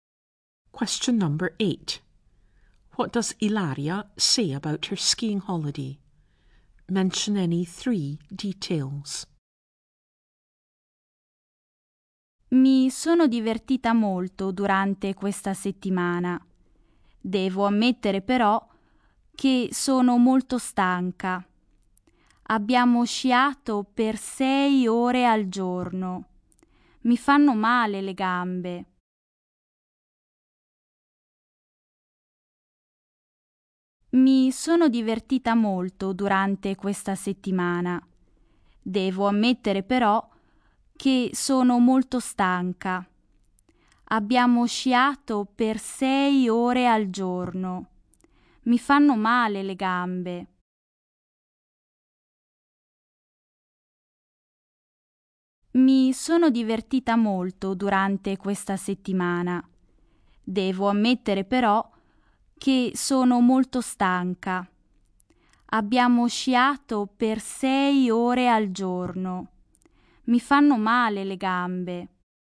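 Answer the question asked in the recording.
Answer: She had a lot of fun; she is very tired; they skied 6 hours a day; her legs hurt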